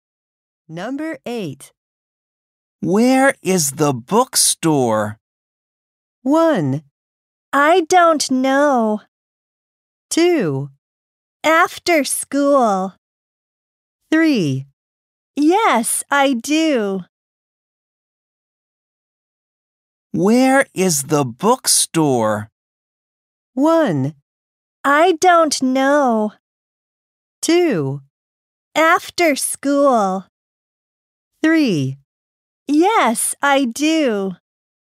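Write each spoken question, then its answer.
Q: Where is the bookstore?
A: 1: I don't know.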